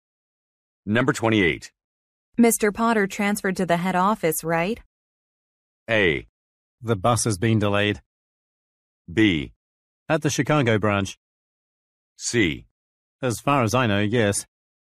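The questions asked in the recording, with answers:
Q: Mr. Potter transferred to the head office, right?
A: C: As far as I know, yes.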